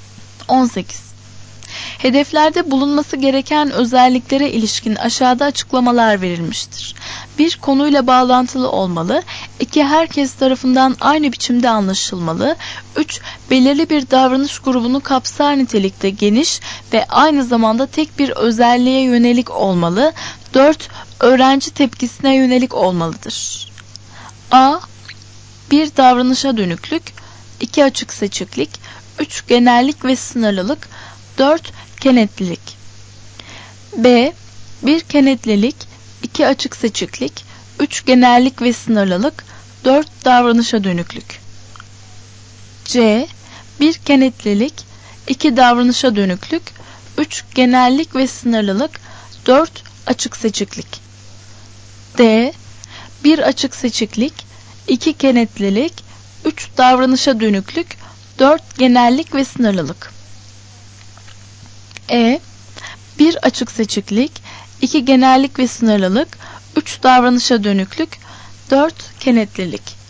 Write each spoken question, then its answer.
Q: Hedeflerde bulunması gereken özelliklere ilişkin aşağıda açıklamalar verilmiştir.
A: Doğru cevap B.